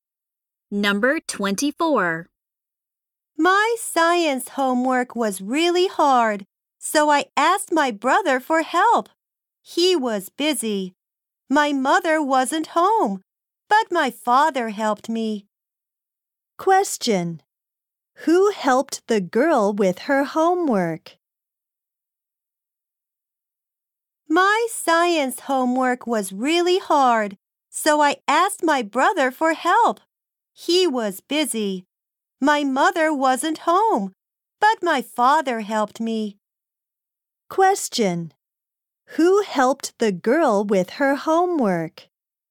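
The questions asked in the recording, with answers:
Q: Who helped the girl with her homework?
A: Her father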